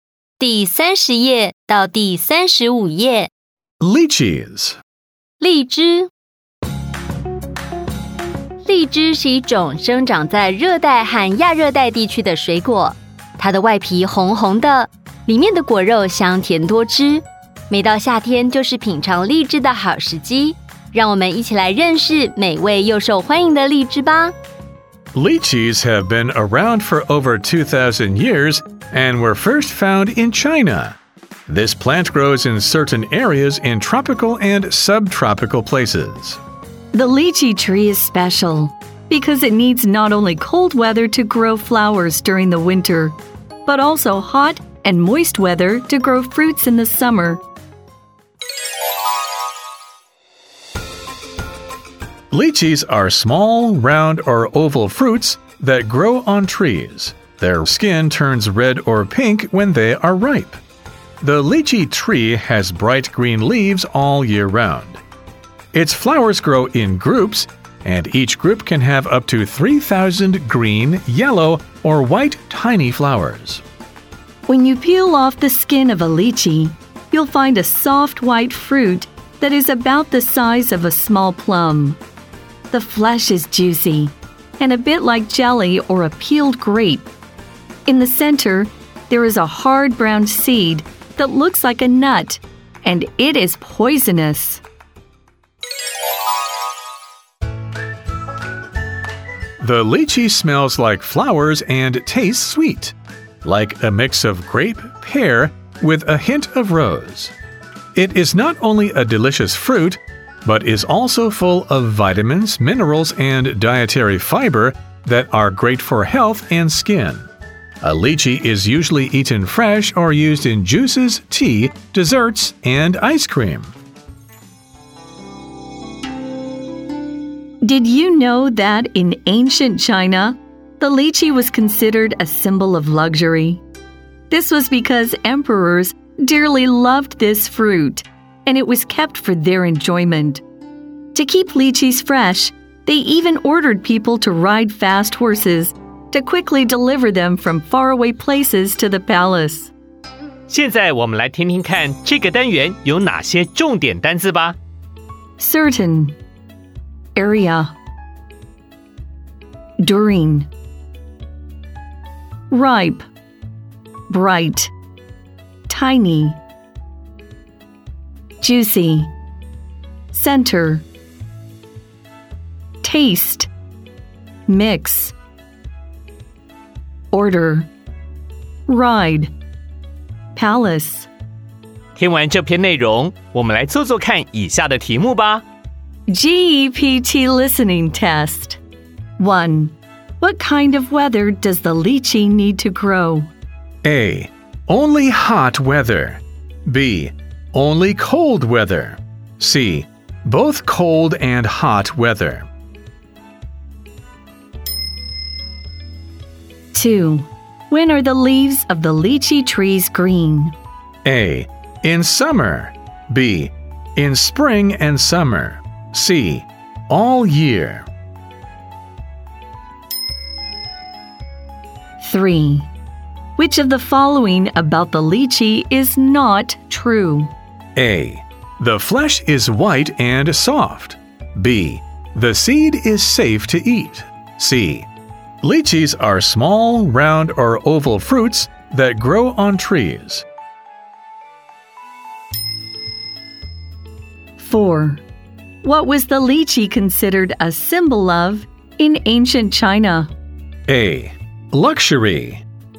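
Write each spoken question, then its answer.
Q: What kind of weather does the lychee need to grow?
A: C: Both cold and hot weather.

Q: When are the leaves of the lychee trees green?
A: C: All year.

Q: Which of the following about the lychee is not true?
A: B: The seed is safe to eat.

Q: What was the lychee considered a symbol of in ancient China?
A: A: Luxury.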